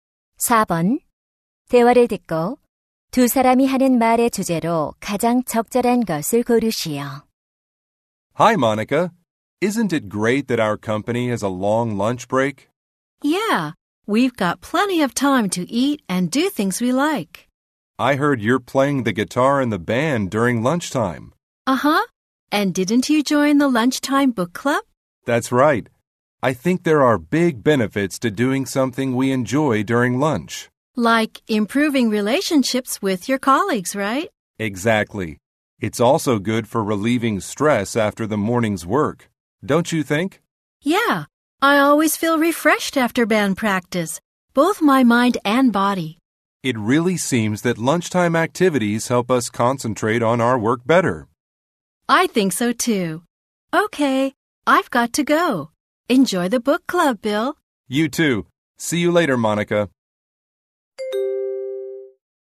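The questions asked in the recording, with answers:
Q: 대화를 듣고 두 사람이 하는 말의 주제로 가장 적절한 것을 고르시오.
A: 점심시간 활동의 이점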